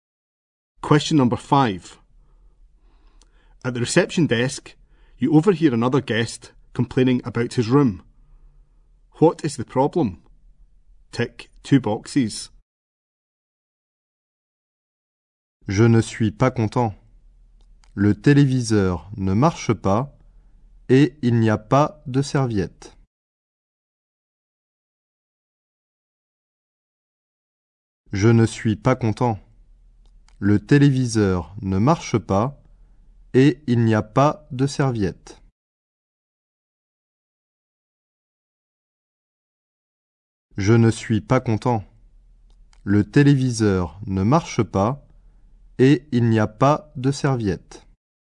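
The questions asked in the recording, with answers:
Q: What is the problem?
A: The TV doesn't work and there is no towel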